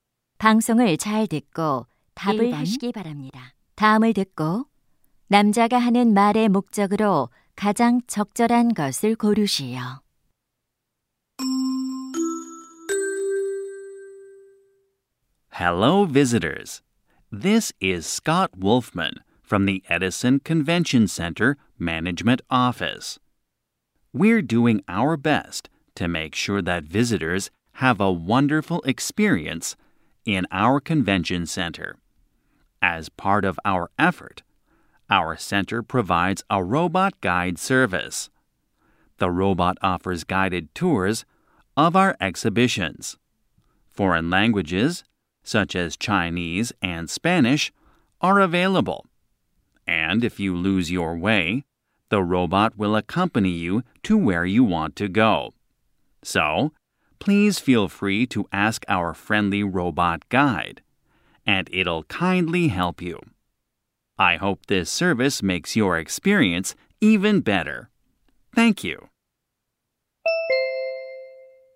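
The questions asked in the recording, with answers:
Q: 다음을 듣고 남자가 하는 말의 목적으로 가장 적절한 것을 고르시오.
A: 컨벤션 센터의 로봇 안내 서비스를 소개하려고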